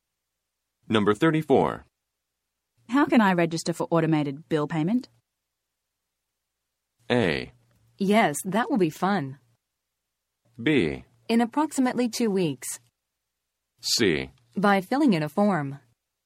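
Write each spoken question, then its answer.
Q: How can I register for automated bill payment?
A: C: By filling in a form.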